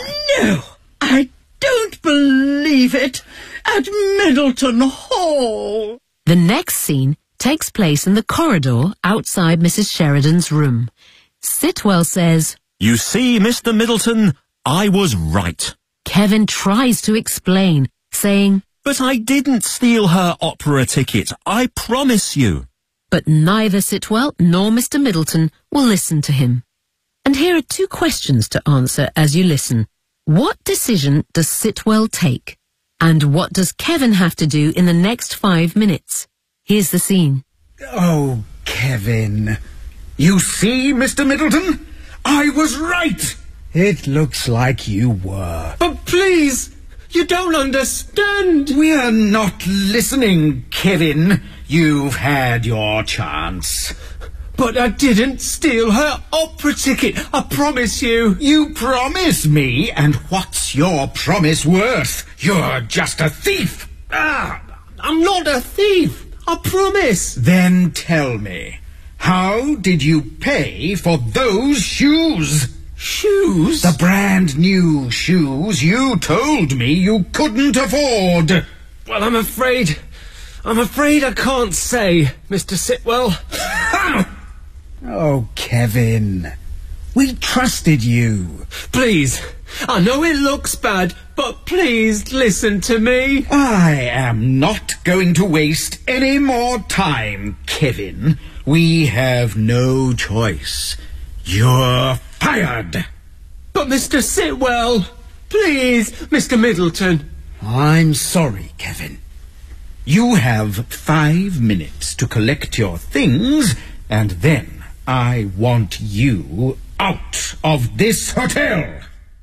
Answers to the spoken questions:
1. We have no choice. You're fired.
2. You have 5 minutes to collect your things and then I want you out of this hotel.